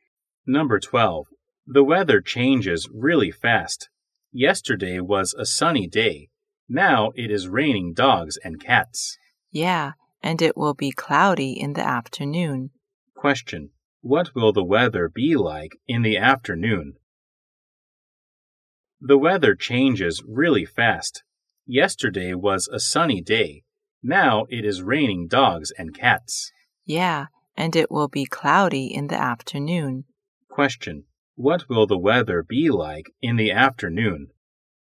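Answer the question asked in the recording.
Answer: Cloudy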